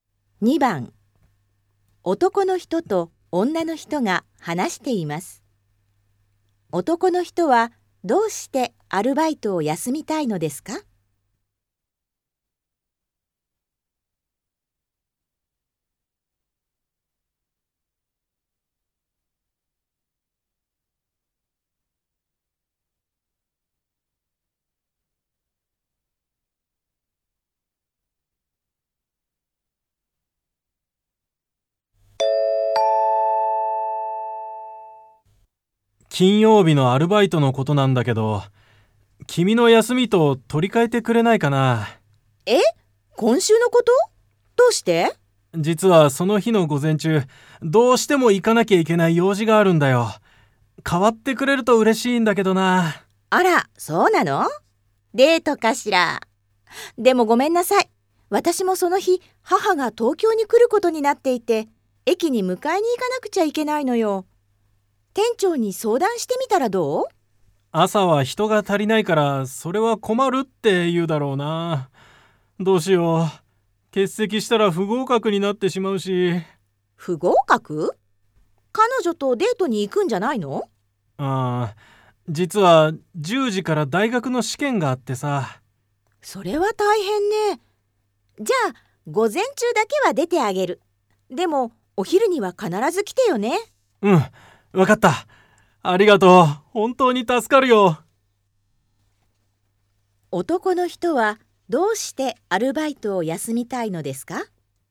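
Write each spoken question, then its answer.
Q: 男の人はどうしてアルバイトを休みたいのですか?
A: 大学の試験があるから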